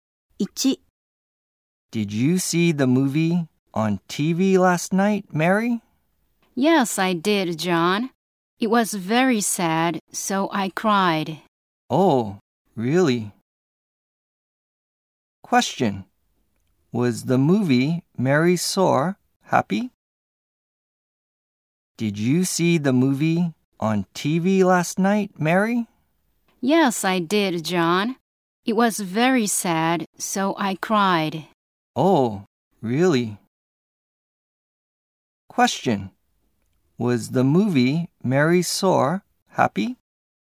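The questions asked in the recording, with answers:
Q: Question. Was the movie Mary Saw happy?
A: No, it was sad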